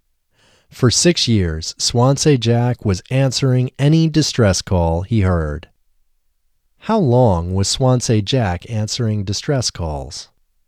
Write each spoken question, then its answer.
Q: How long was Swansea Jack answering distress calls?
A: For 6 years, Swansea Jack was answering distress calls.